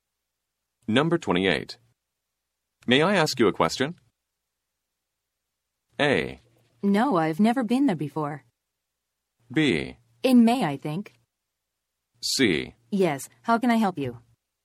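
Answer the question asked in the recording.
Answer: C: Yes, how can I help you?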